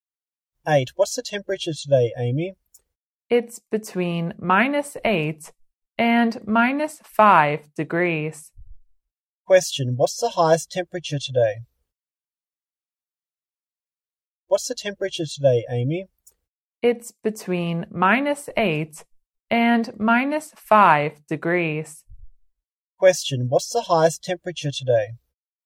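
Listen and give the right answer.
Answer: -5 degrees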